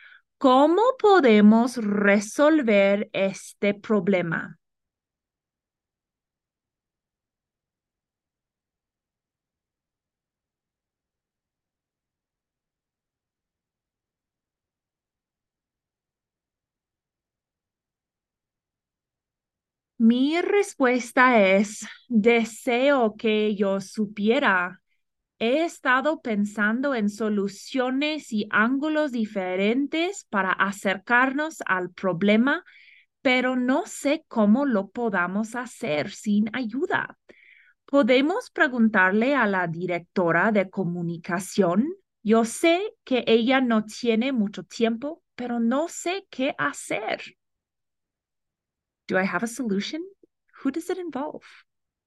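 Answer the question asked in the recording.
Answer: No; asking the communications director for help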